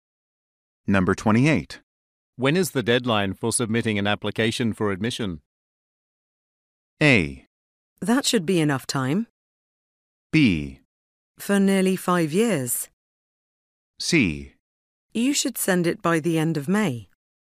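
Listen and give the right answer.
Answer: C: You should send it by the end of May.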